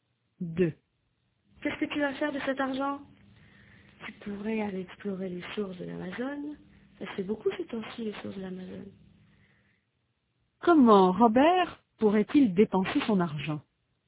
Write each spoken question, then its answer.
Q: Comment Robert pourrait-il dépenser son argent?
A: Il pourrait aller explorer les sources de l'Amazon.